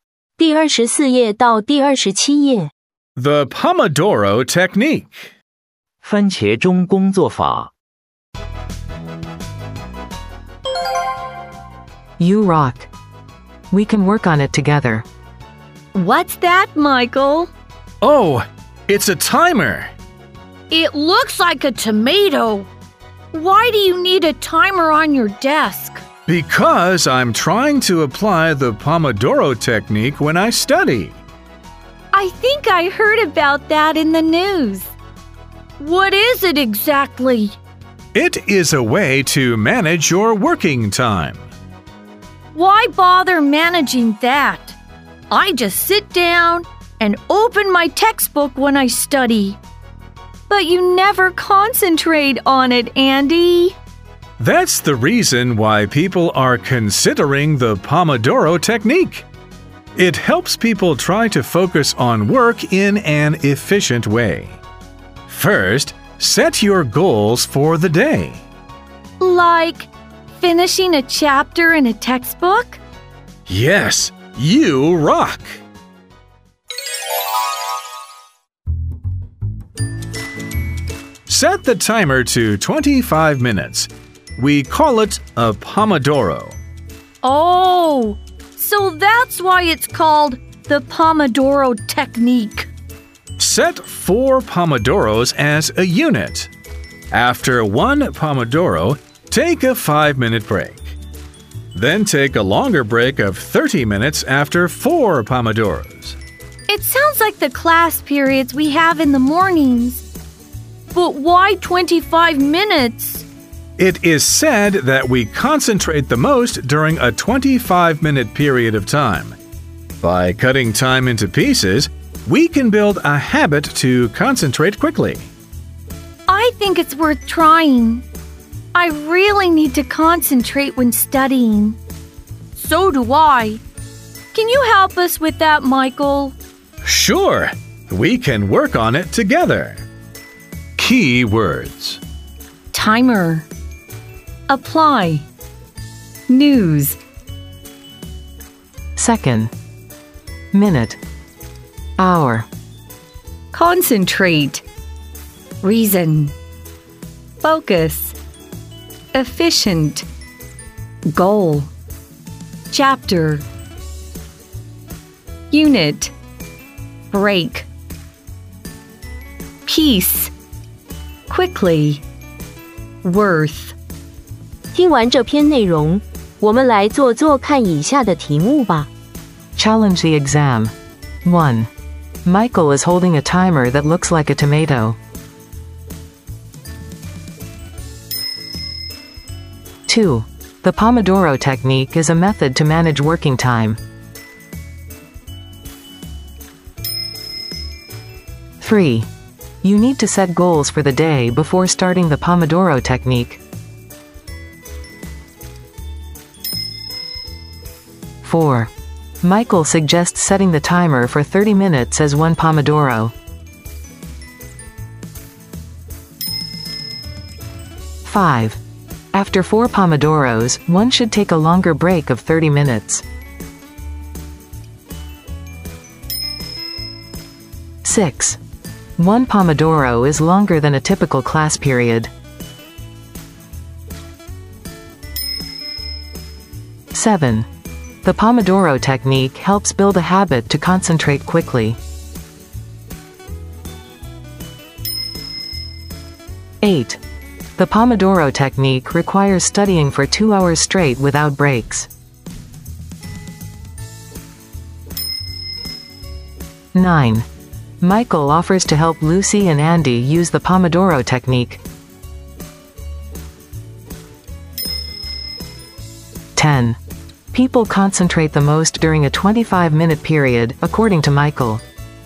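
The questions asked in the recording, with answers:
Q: The Pomodoro technique is a method to manage working time.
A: True

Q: You need to set goals for the day before starting the Pomodoro technique.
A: True

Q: Michael suggests setting the timer for 30 minutes as one Pomodoro.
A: False

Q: After 4 Pomodoros, one should take a longer break of 30 minutes.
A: True

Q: The Pomodoro technique helps build a habit to concentrate quickly.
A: True

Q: The Pomodoro technique requires studying for 2 hours straight without breaks.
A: False

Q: People concentrate the most during a 25-minute period, according to Michael.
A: True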